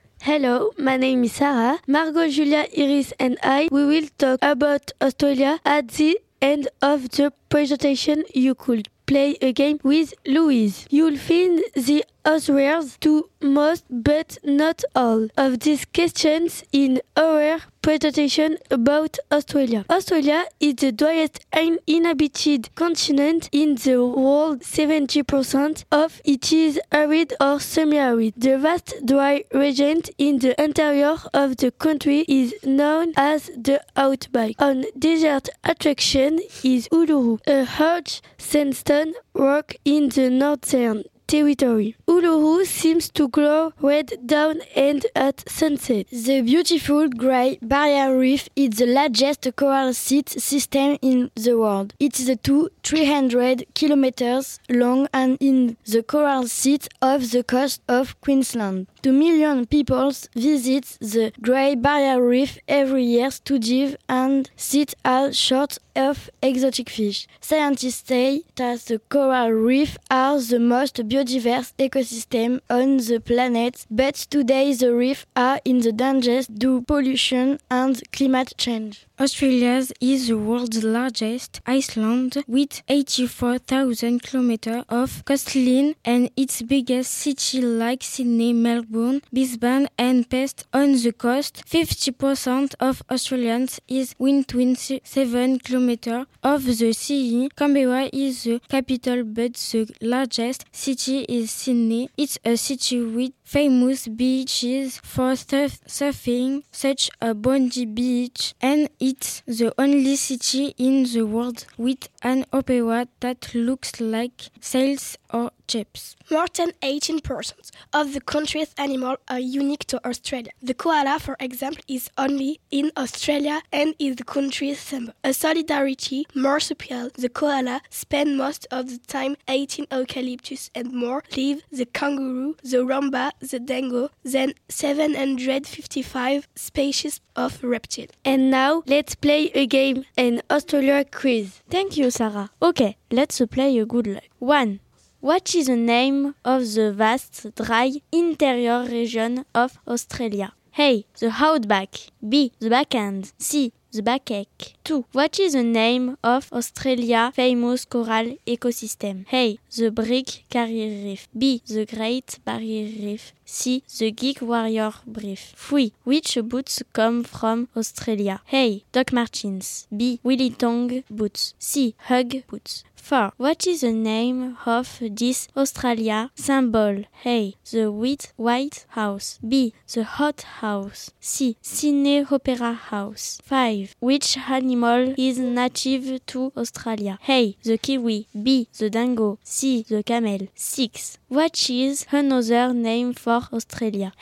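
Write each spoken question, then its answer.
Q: What is the name of the vast, dry, interior region of Australia?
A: A: The Outback

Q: What is the name of Australia's famous coral ecosystem?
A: B: The Great Barrier Reef

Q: Which animal is native to Australia?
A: B: The dingo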